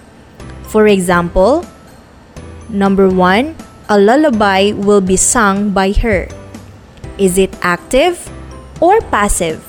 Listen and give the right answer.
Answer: Precisely, it's in the passive voice.